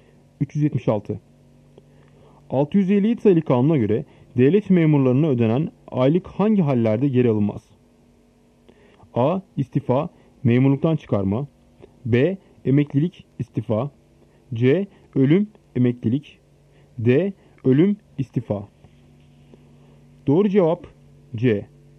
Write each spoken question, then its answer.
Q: 657 sayılı kanuna göre devlet memurlarına ödenen aylık hangi hallerde geri alınmaz?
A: Doğru cevap C. Ölüm, emeklilik.